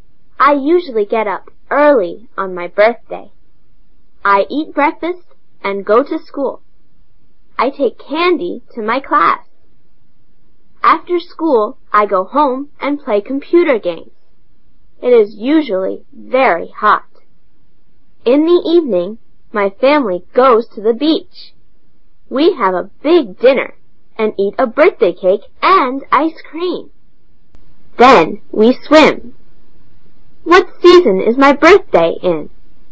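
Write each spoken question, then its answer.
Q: What season is my birthday in?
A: Summer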